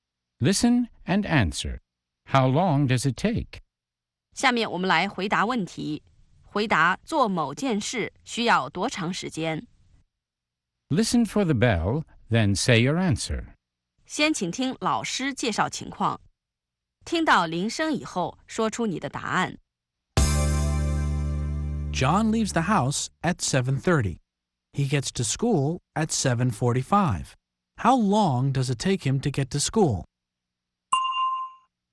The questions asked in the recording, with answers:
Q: How long does it take him to get to school?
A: It takes him 15 minutes. It takes him 15 minutes to get to school.